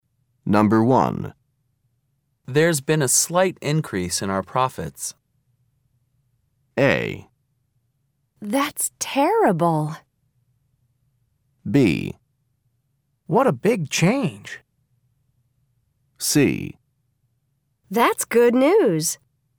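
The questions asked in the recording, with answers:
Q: There's been a slight increase in our profits.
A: C: That's good news.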